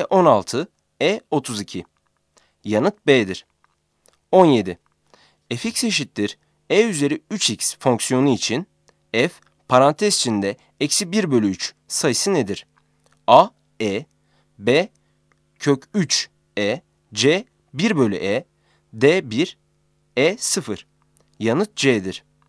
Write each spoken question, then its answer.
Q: Fx eşittir e üzeri 3x fonksiyonu için f parantez içinde eksi 1 bölü 3 sayısı nedir?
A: Yanıt C'dir.